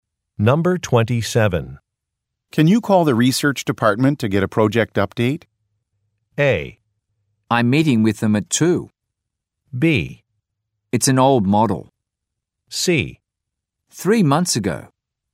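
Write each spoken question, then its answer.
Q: Can you call the research department to get a project update?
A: A: I'm meeting with them at 2.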